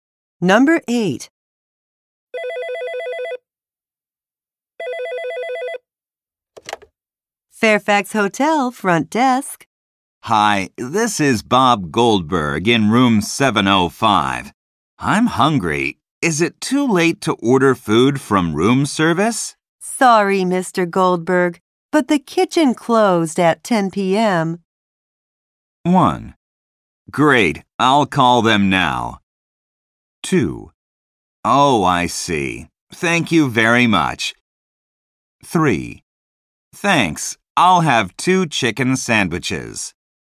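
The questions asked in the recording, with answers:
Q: Sorry, Mr. Goldberg, but the kitchen closed at 10 p.m.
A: 2: Oh, I see. Thank you very much.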